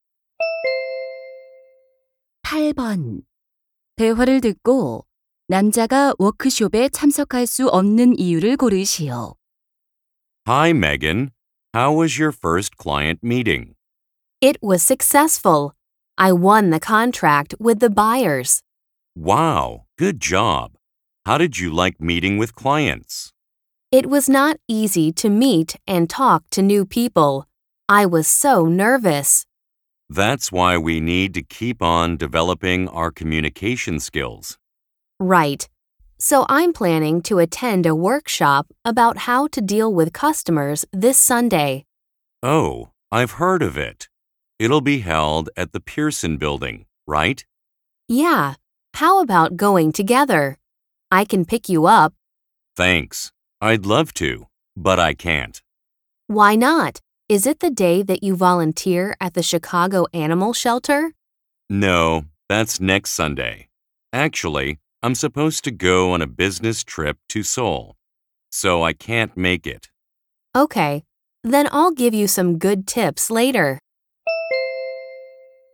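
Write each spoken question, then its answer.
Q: 대화를 듣고 남자가 워크숍에 참석할 수 없는 이유를 고르시오.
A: 서울로 출장을 가야 해서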